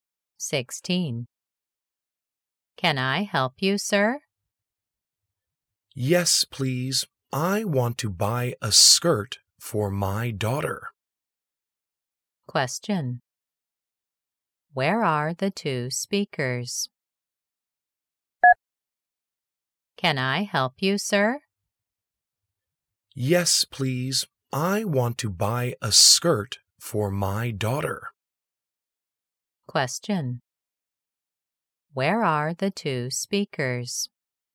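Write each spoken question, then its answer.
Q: Where are the two speakers?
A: In a clothes store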